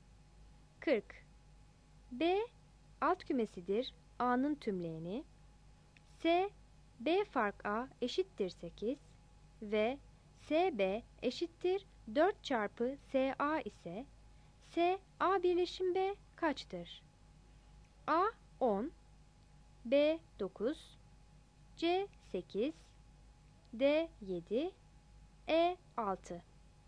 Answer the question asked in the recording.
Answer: 40 A